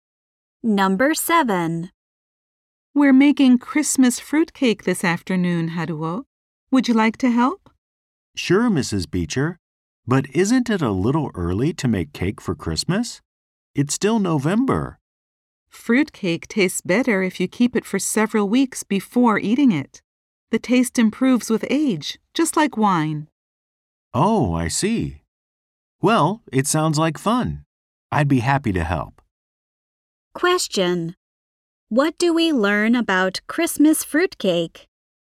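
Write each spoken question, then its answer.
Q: What do we learn about Christmas fruitcake?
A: It tastes better after being kept for several weeks.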